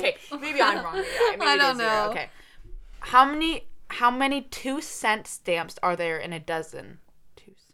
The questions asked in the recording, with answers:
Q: How many 2-cent stamps are there in a dozen?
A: 12.